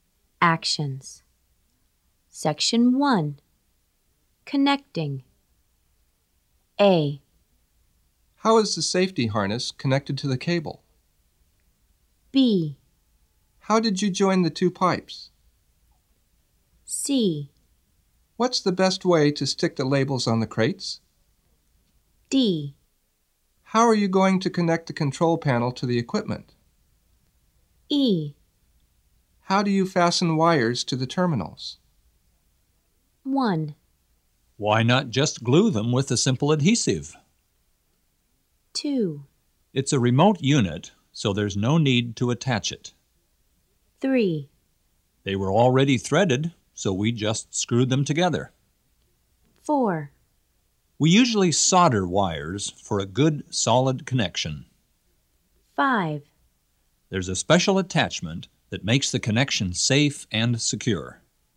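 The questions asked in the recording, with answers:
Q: How is the safety harness connected to the cable?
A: 5: There's a special attachment that makes the connection safe and secure.

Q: How did you join the two pipes?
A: 3: They were already threaded, so we just screwed them together.

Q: What's the best way to stick the labels on the crates?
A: 1: Why not just glue them with a simple adhesive?

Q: How are you going to connect the control panel to the equipment?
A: 2: It's a remote unit, so there's no need to attach it.

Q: How do you fasten wires to the terminals?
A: 4: We usually solder wires for a good, solid connection.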